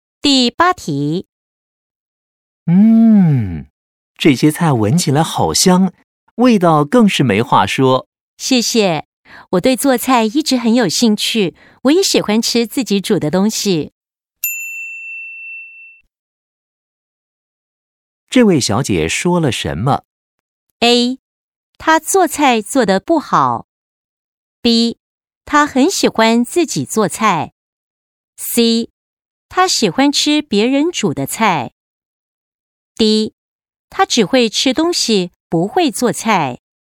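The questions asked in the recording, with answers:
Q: 这位小姐说了什么?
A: B: 她很喜欢自己做菜。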